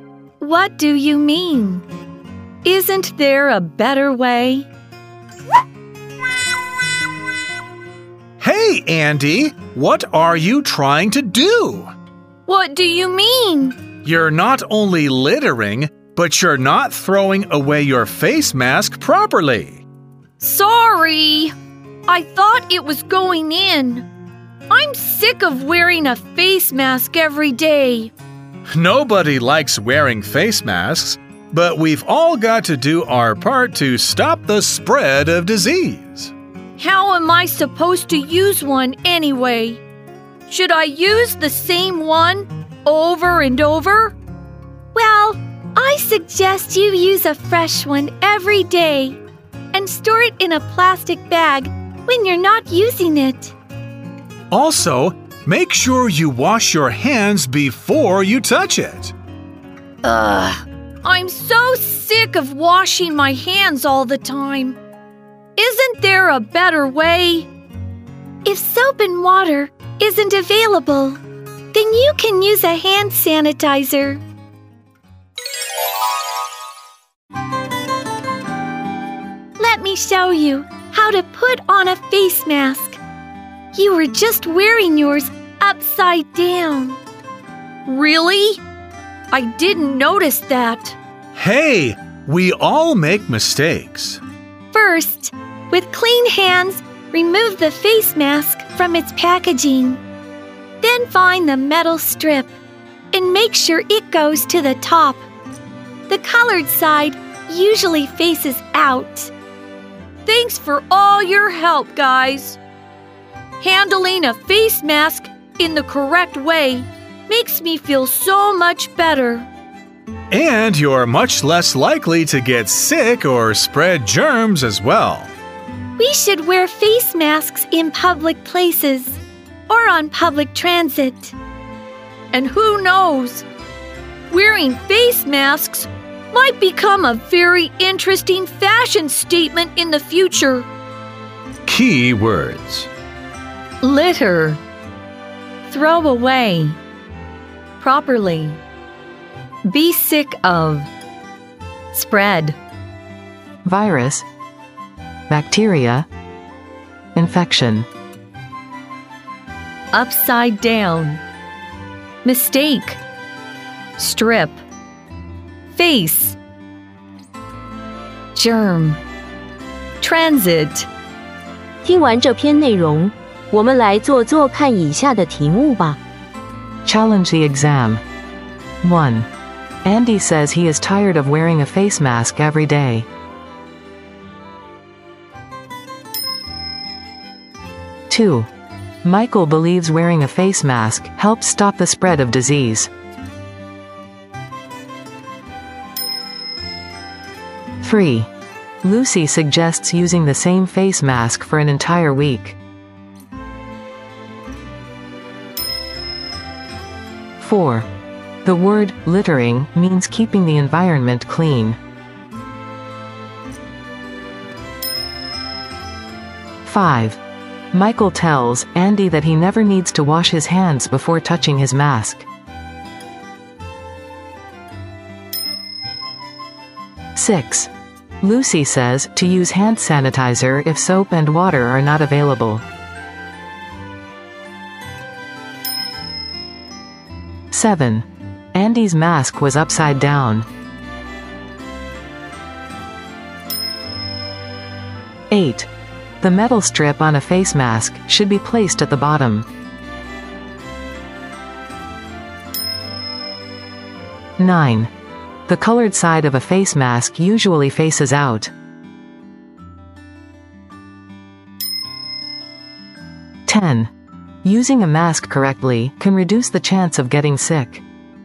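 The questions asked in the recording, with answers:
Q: Andy says he is tired of wearing a face mask every day.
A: True

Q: Lucy suggests using the same face mask for an entire week.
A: False

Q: The word littering means keeping the environment clean.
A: False

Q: Michael tells Andy that he never needs to wash his hands before touching his mask.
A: False

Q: Andy's mask was upside down.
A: True

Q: The metal strip on a face mask should be placed at the bottom.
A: False

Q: The colored side of a face mask usually faces out.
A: True

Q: Using a mask correctly can reduce the chance of getting sick.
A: True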